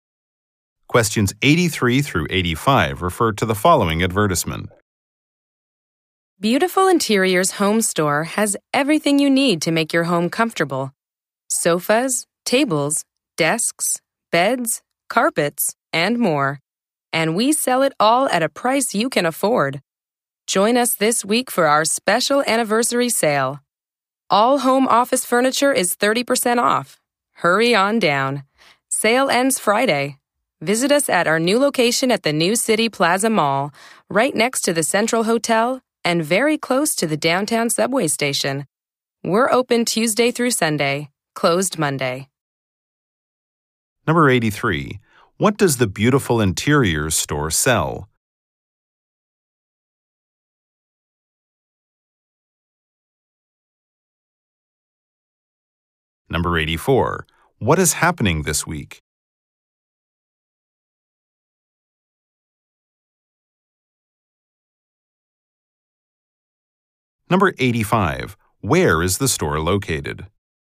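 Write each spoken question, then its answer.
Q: What does the Beautiful Interiors store sell?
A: Furniture.

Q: What is happening this week?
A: An anniversary sale.

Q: Where is the store located?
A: In the New City Plaza Mall.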